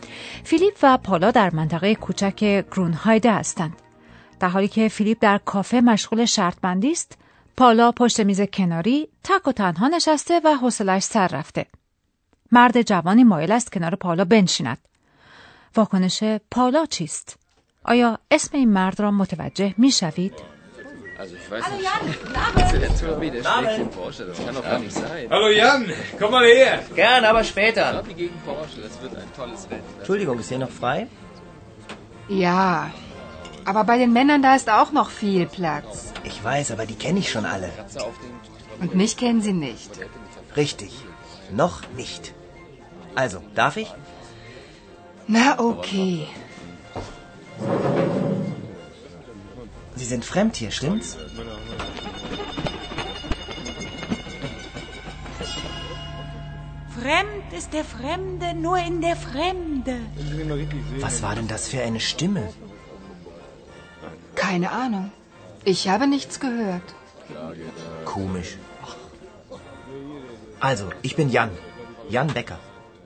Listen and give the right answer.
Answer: اسم او یان